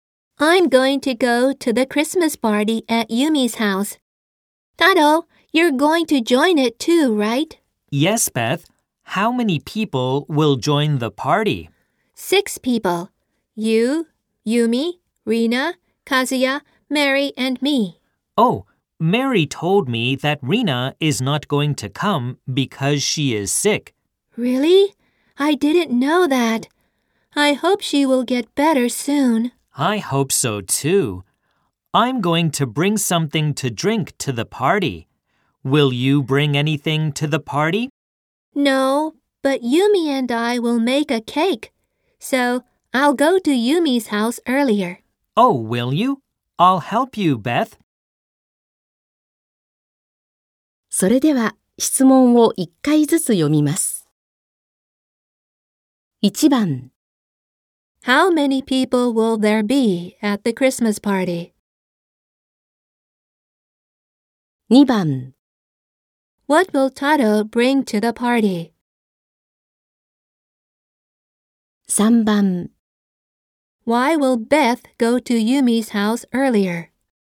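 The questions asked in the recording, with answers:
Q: How many people will there be at the Christmas party?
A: Five

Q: What will Taro bring to the party?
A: Something to drink

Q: Why will Beth go to Yumi's house earlier?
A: To make a cake with Yumi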